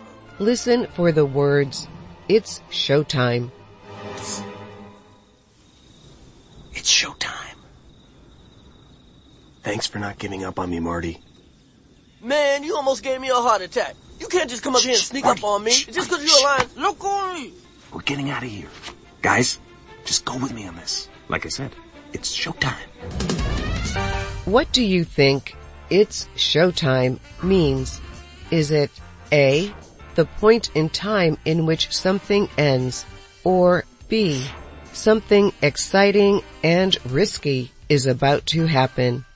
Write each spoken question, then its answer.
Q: What do you think "it's showtime" means?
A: The answer is B, something exciting and risky is about to happen.